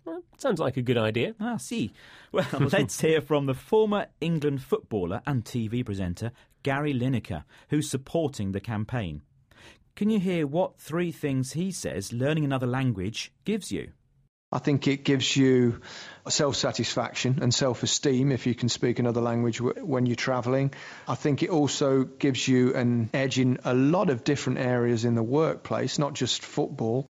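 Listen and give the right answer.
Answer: Self-satisfaction, self-esteem, and an edge in the workplace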